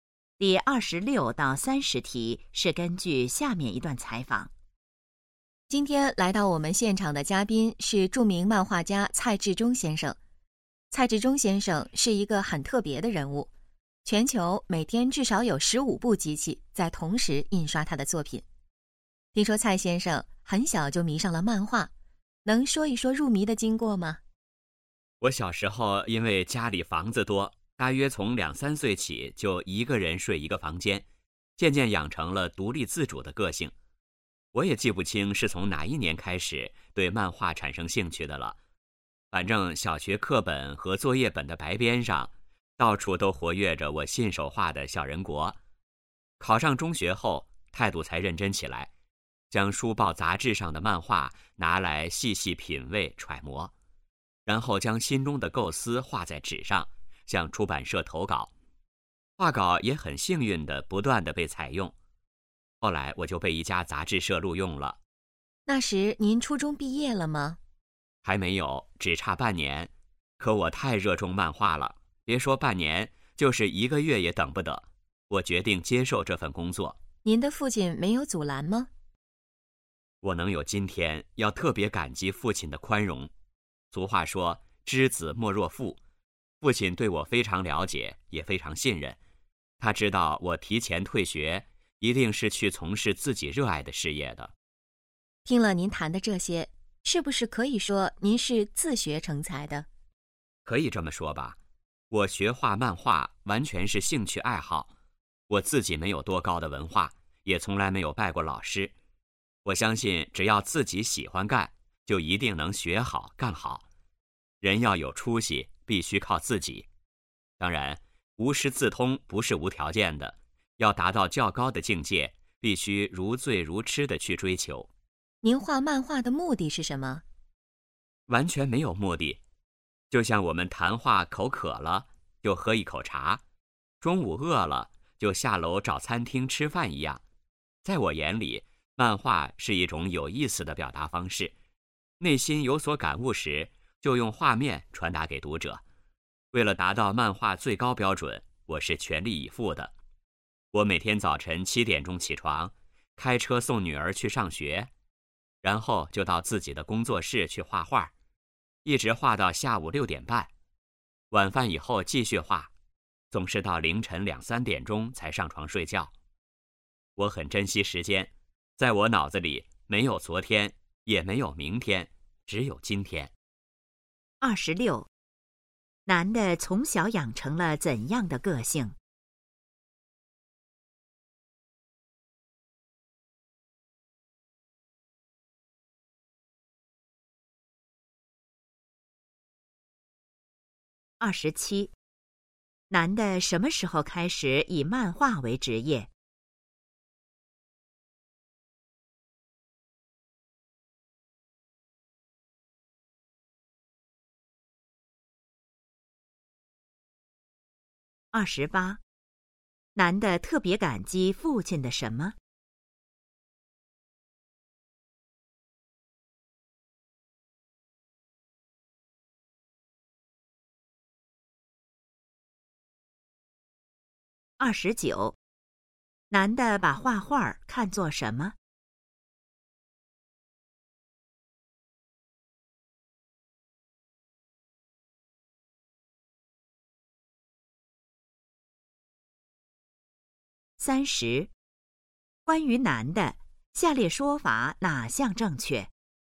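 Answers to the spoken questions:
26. 独立自主
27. 初中还差半年毕业时
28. 宽容
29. 一种有意思的表达方式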